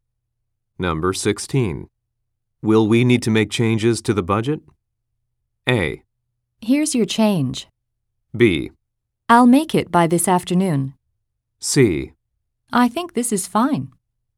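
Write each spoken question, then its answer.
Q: Will we need to make changes to the budget?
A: C: I think this is fine.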